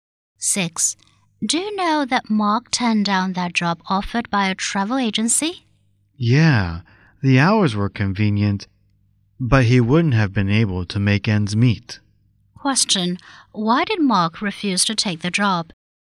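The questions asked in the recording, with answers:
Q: Why did Mark refuse to take the job?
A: The pay was too low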